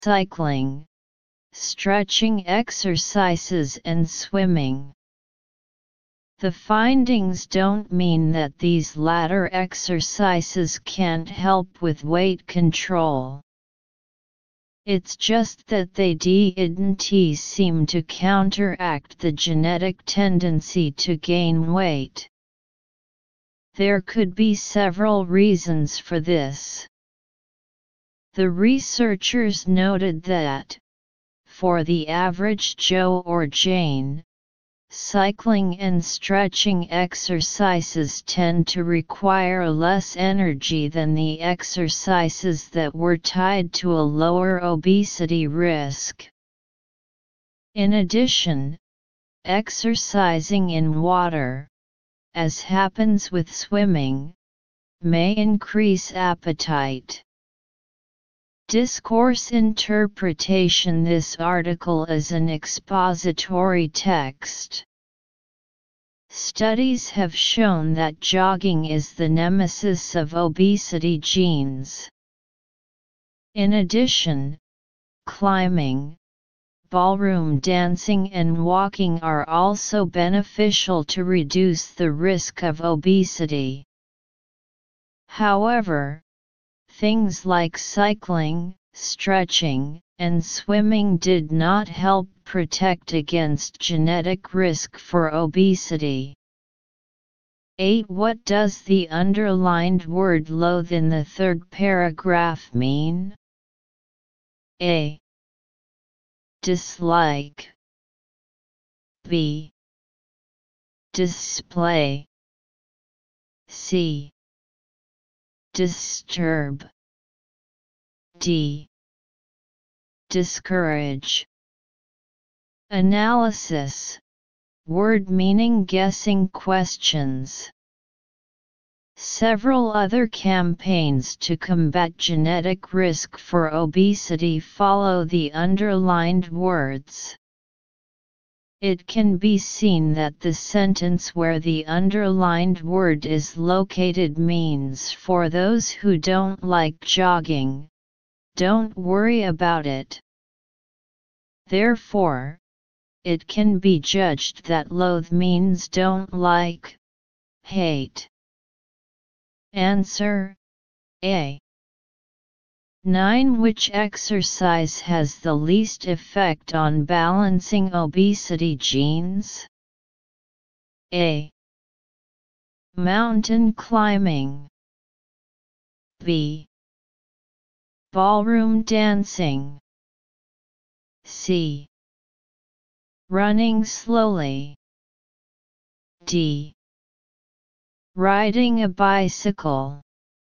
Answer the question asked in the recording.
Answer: D.